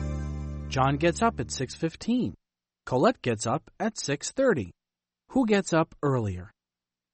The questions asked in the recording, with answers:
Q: Who gets up earlier?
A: John does. John gets up earlier than Colette.